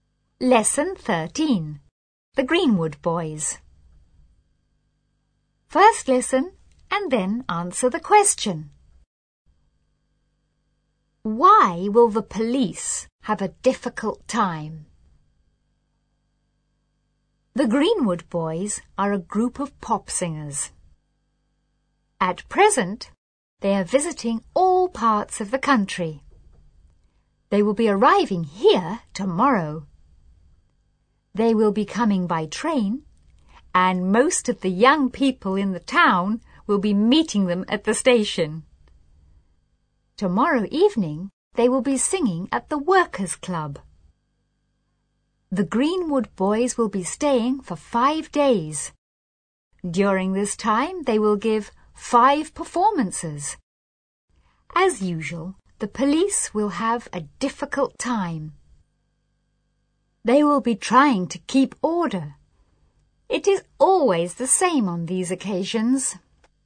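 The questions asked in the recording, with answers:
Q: Why will the police have a difficult time?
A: Because they will be trying to keep order when the Greenwood Boys visit.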